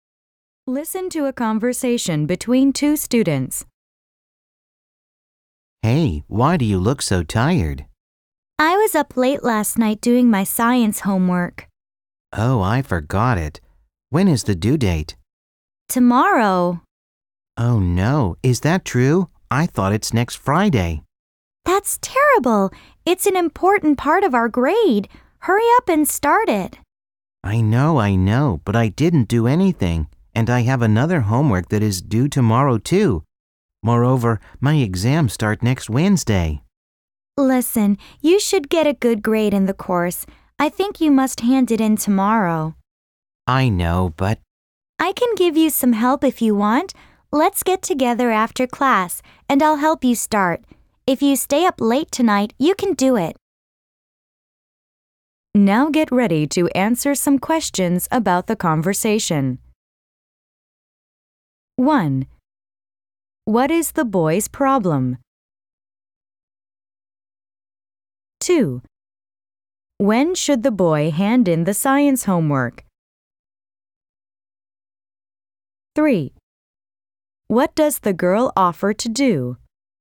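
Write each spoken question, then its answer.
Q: What is the boy's problem?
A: He forgot his science homework, which is due tomorrow

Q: When should the boy hand in the science homework?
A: Tomorrow

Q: What does the girl offer to do?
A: Help him get started on the homework after class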